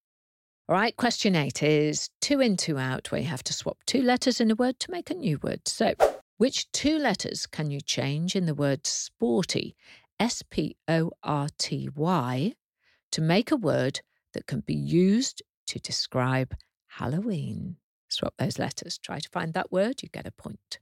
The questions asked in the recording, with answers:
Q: So, which two letters can you change in the word sporty, S-P-O-R-T-Y, to make a word that can be used to describe Halloween?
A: Change the R to another O and the T to a K to get spooky.